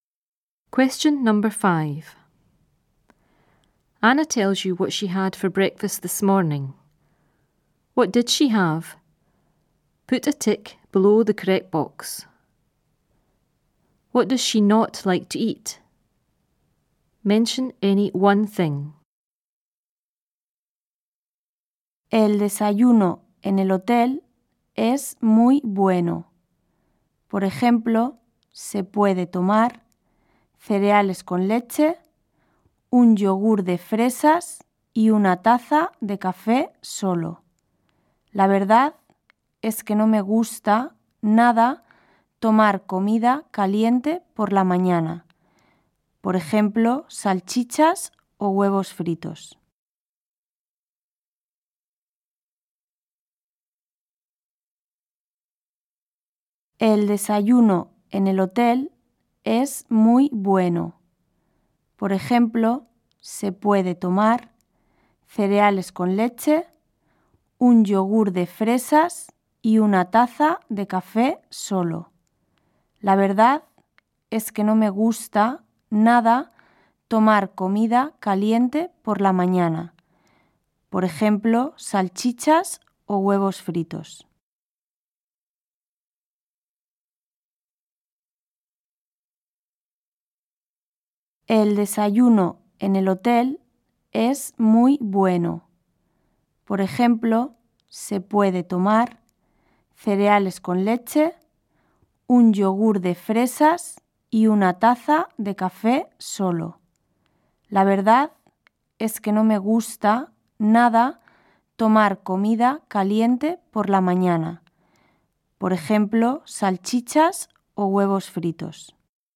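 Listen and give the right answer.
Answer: Hot food in the morning, e.g. sausages or fried eggs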